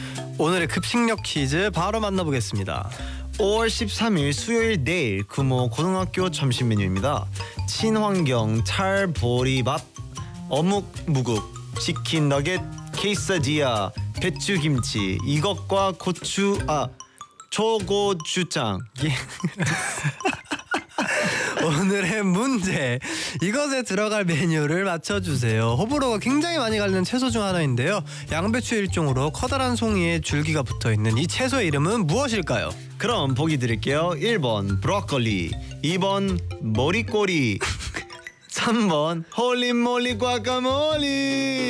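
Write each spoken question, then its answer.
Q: 양배추 일종으로 커다란 송이에 줄기가 붙어있는 이 채소의 이름은 무엇일까요?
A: 1: 브로콜리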